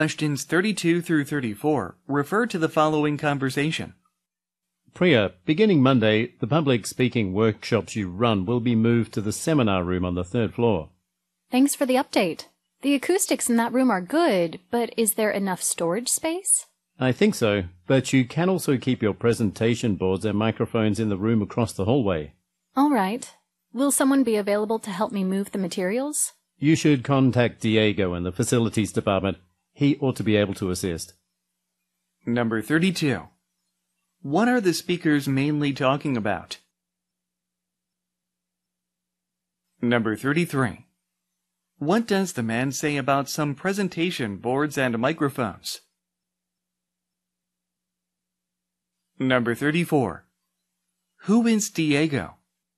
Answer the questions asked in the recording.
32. A번 a change in workshop location.
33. C번 they can be stored in another room
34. D번, a facilities staff member